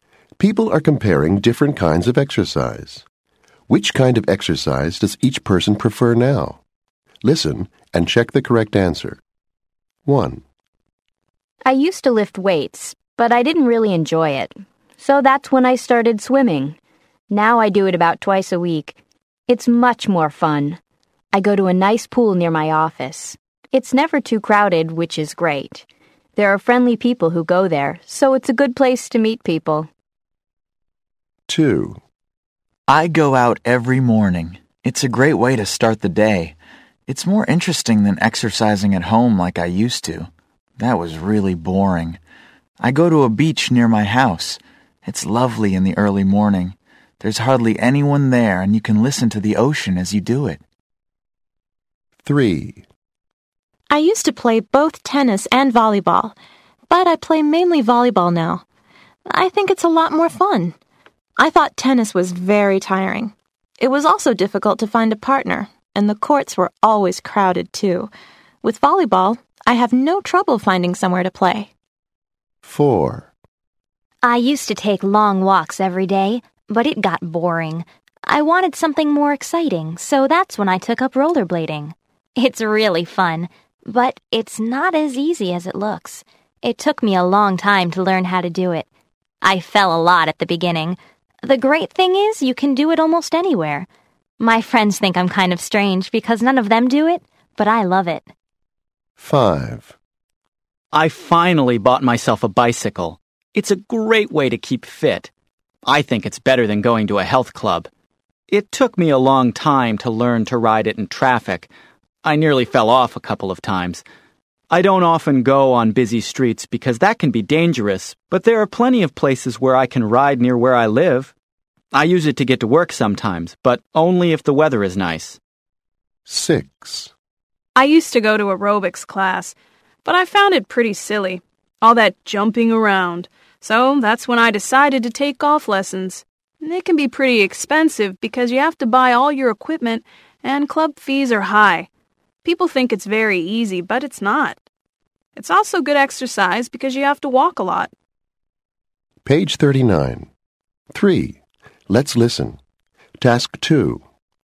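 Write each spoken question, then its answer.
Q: Which kind of exercise does each person prefer now?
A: Swimming

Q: Which kind of exercise does each person prefer now?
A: Volleyball

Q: Which kind of exercise does each person prefer now?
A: Rollerblading

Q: Which kind of exercise does each person prefer now?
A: Bicycling

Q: Which kind of exercise does each person prefer now?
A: Golf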